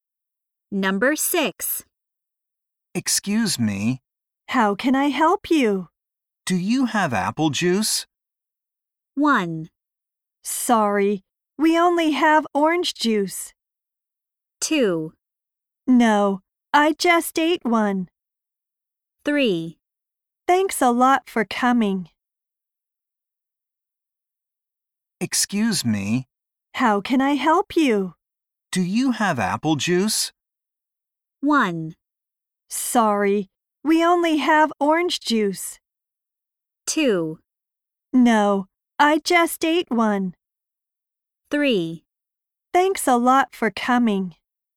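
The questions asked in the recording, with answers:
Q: Do you have apple juice?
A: 1: Sorry, we only have orange juice.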